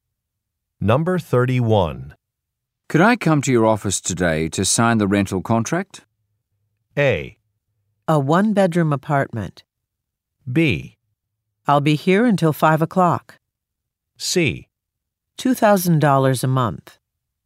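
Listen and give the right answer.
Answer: B: I'll be here until 5 o'clock.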